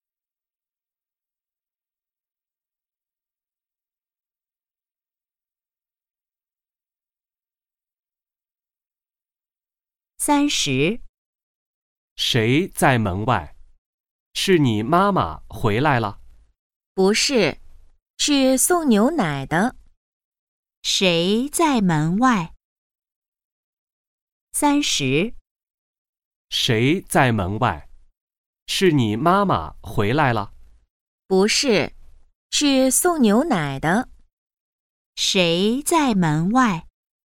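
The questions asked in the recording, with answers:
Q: 谁在门外?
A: 送牛奶的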